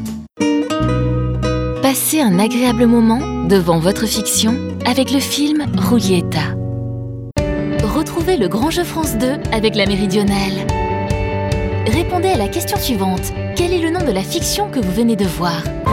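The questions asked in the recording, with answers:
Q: Quel est le nom de la fiction que vous venez de voir?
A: Julieta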